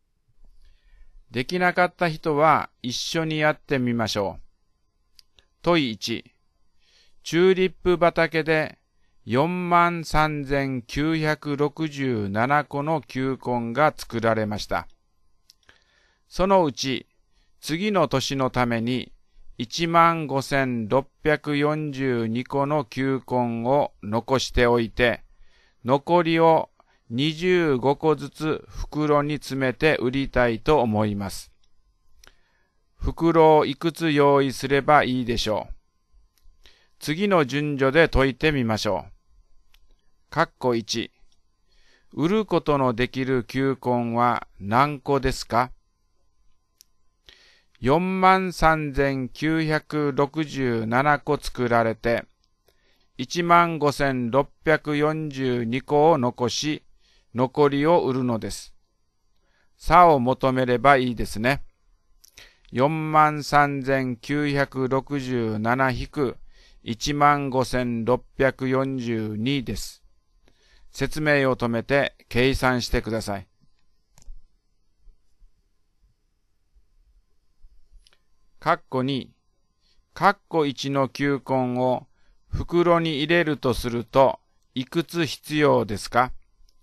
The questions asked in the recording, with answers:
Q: 括弧1。売ることのできる球根は何個ですか?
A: 28,325 ですね。